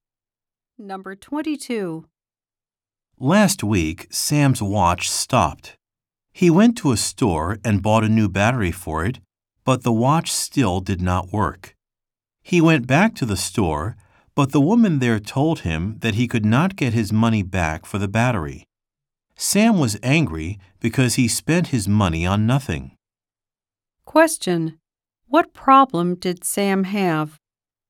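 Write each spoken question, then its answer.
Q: What problem did Sam have?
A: His watch still did not work after he bought a new battery, and he could not get his money back.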